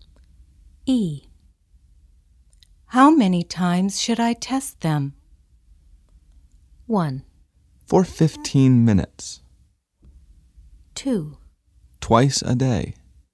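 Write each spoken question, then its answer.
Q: How many times should I test them?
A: 2: Twice a day.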